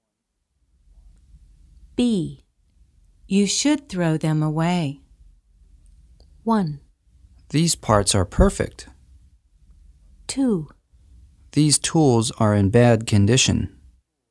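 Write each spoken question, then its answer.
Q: You should throw them away.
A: 2: These tools are in bad condition.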